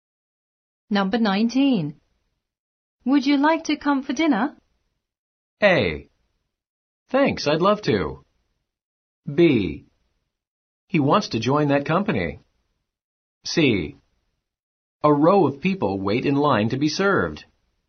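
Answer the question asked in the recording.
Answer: A: Thanks, I'd love to.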